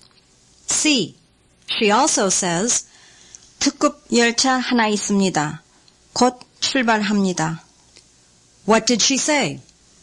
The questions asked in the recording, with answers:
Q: What did she say?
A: She said, there is an express train.